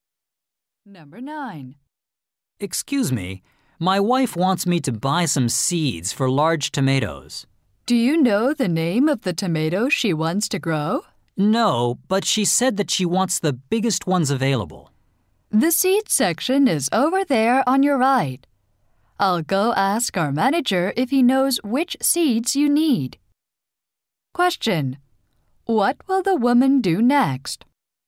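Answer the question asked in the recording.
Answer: Ask her manager which seeds he needs.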